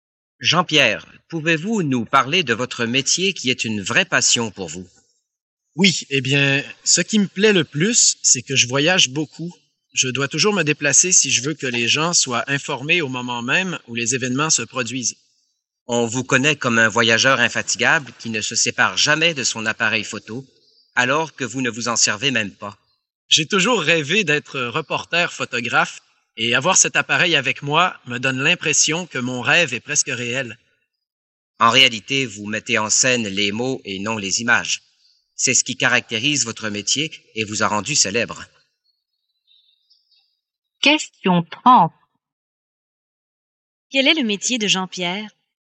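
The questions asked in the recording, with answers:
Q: Quel est le métier de Jean-Pierre ?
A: Journaliste (reporter)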